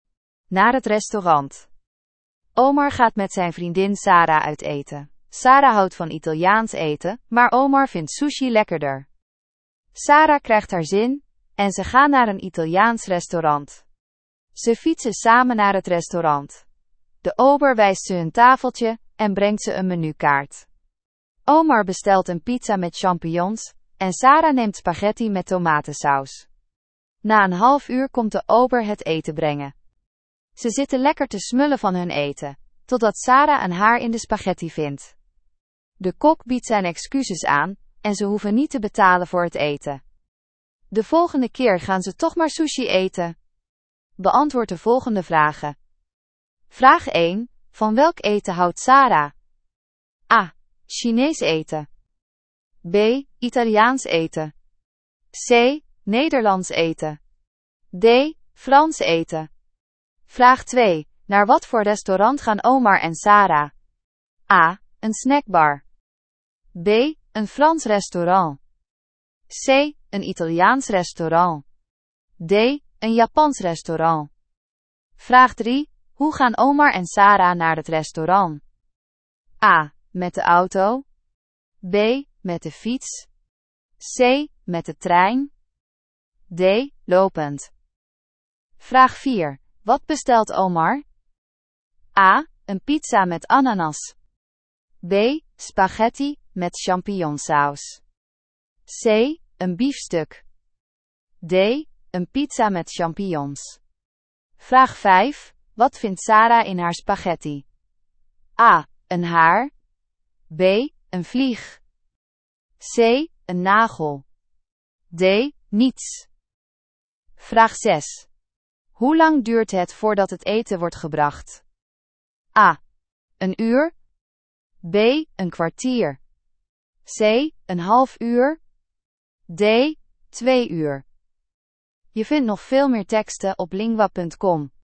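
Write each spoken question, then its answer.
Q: Van welk eten houdt Sara?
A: B: Italiaans eten.

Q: Naar wat voor restaurant gaan Omar en Sara?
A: C: Een Italiaans restaurant.

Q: Hoe gaan Omar en Sara naar het restaurant?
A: B: Met de fiets.

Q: Wat bestelt Omar?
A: D: Een pizza met champignons.

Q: Wat vindt Sara in haar spaghetti?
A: A: Een haar.

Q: Hoe lang duurt het voordat het eten wordt gebracht?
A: C: Een half uur.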